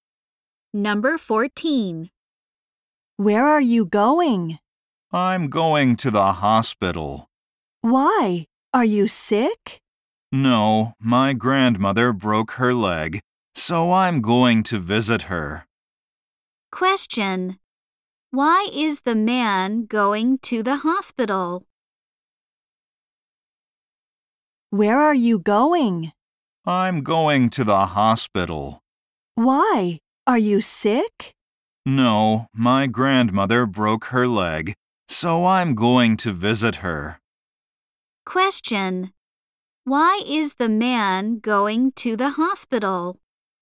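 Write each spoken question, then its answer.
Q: Why is the man going to the hospital?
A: To visit his grandmother, who broke her leg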